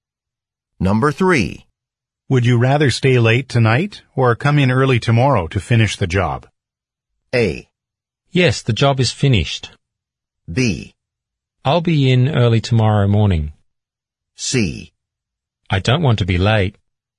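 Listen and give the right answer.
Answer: B: I'll be in early tomorrow morning.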